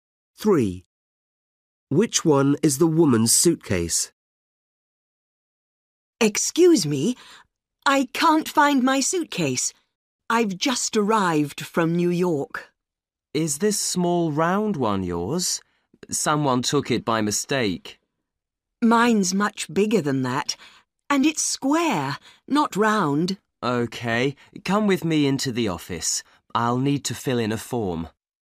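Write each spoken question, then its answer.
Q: Which one is the woman's suitcase?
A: a big square one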